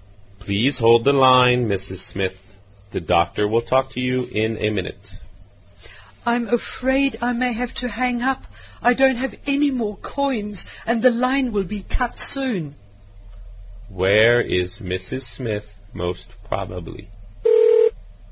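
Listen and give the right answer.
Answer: In a public phone booth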